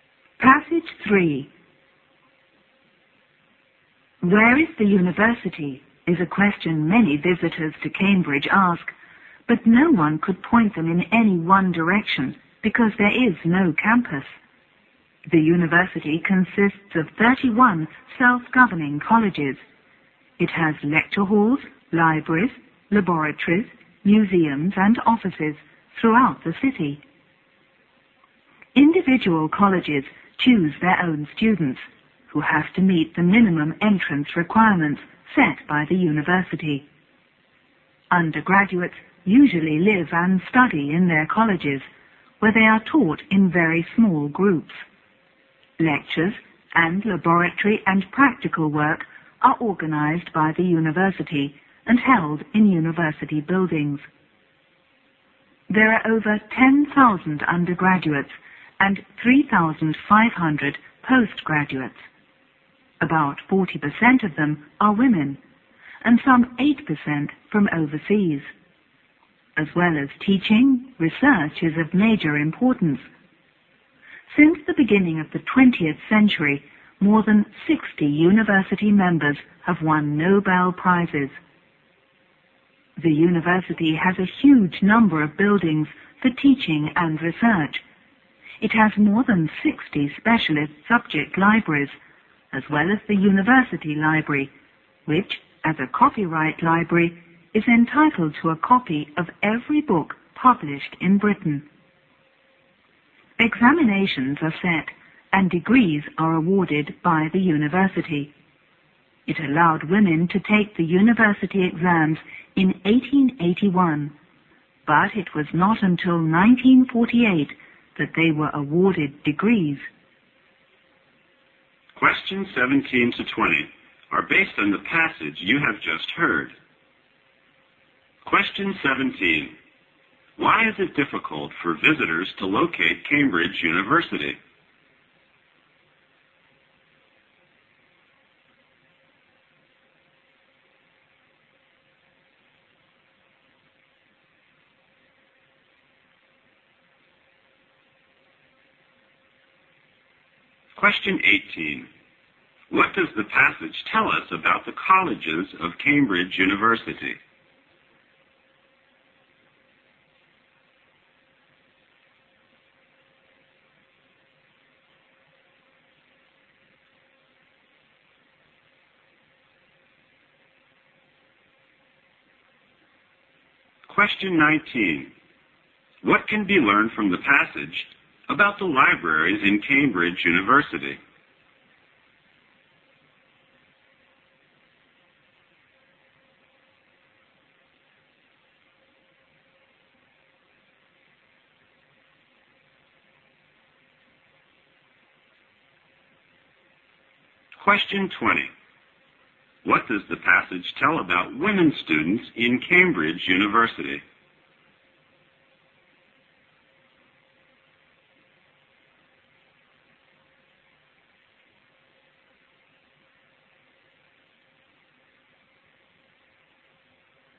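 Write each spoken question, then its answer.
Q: Why is it difficult for visitors to locate Cambridge University?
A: It has no campus

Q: What does the passage tell us about the colleges of Cambridge University?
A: They are self-governing and choose their own students

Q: What can be learned from the passage about the libraries in Cambridge University?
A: The university library is entitled to a copy of every book published in Britain

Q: What does the passage tell about women students in Cambridge University?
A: They could take exams from 1881 but got degrees only from 1948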